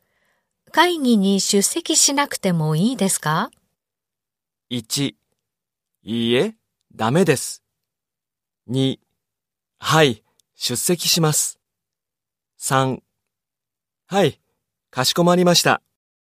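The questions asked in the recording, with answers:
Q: 会議に出席しなくてもいいですか?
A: 2: いいえ、ダメです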